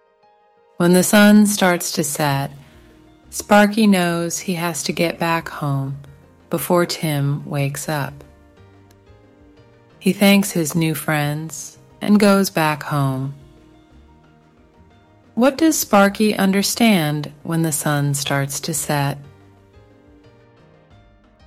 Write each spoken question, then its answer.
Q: What does Sparky understand when the sun starts to set?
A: He knows he has to get back home before Tim wakes up.